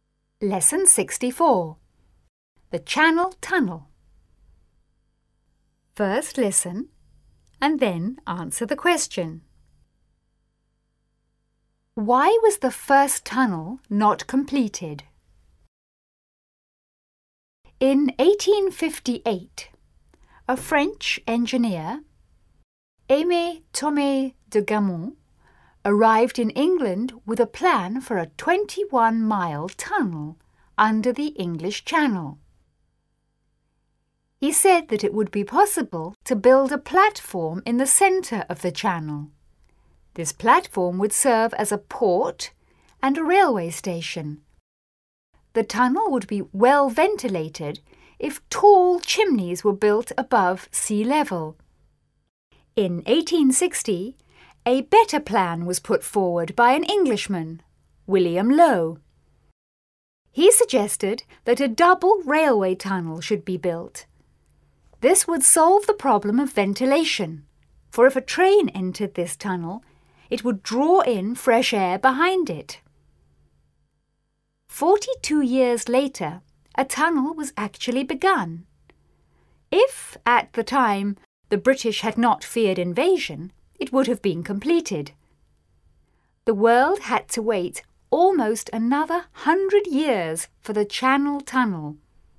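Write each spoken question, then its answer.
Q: Why was the first tunnel not completed?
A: Because the British feared invasion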